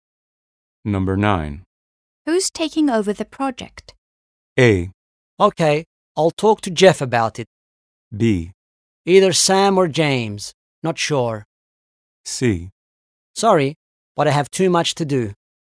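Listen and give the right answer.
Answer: B: Either Sam or James. Not sure.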